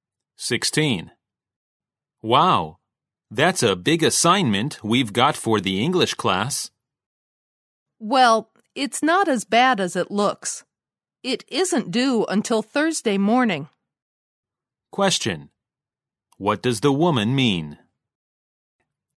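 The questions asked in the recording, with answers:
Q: What does the woman mean?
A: The assignment isn't so bad; there's time because it's not due until Thursday morning.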